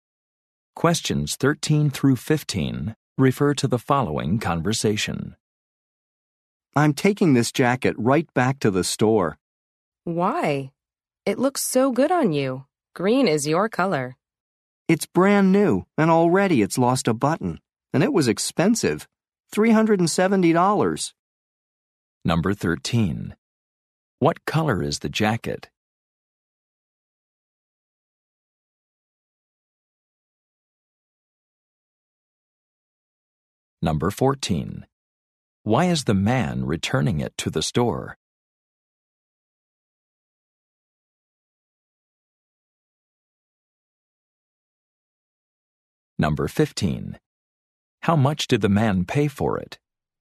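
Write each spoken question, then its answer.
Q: What color is the jacket?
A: Green

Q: Why is the man returning it to the store?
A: It lost a button

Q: How much did the man pay for it?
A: $370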